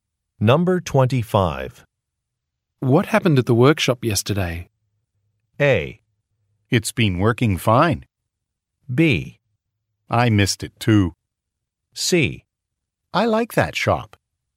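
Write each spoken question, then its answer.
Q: What happened at the workshop yesterday?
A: B: I missed it too.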